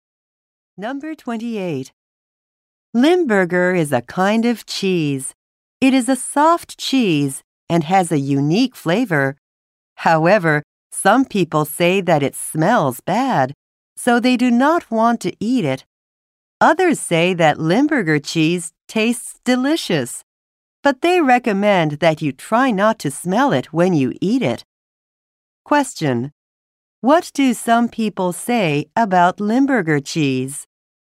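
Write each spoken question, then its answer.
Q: What do some people say about Limburger cheese?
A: It smells bad.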